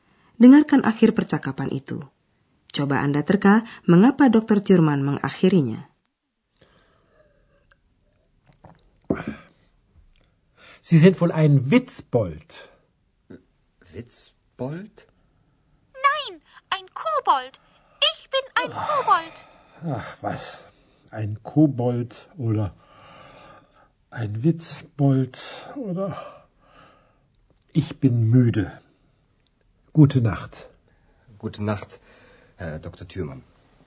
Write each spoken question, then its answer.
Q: Coba Anda terka mengapa Dr. Thurman mengakhirinya.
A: Ya, memang Dr. Thurman sudah mengantuk sekali.